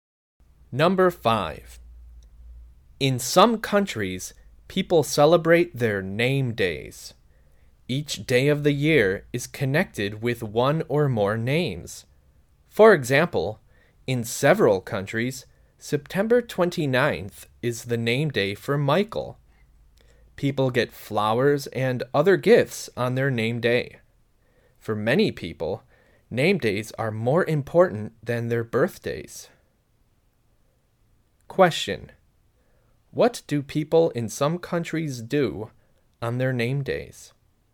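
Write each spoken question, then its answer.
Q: Question: What do people in some countries do on their name days?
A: They get flowers and other gifts.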